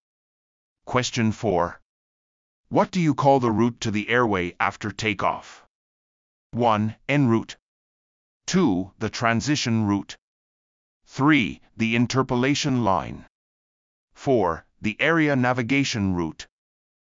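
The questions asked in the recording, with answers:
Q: What do you call the route to the airway after takeoff?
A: 2: The transition route.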